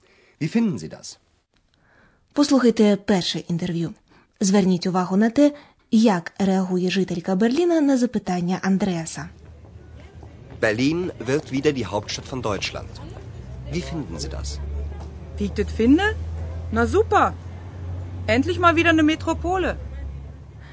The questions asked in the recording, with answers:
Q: Зверніть увагу на те, як реагує жителька Берліна на запитання Андреаса.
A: На чисто берлінському діалекті жінка висловлює своє захоплення.